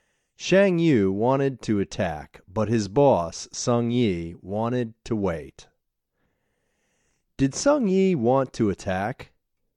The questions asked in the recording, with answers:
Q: Did Sung Yi want to attack?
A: No, Sung Yi didn't want to attack.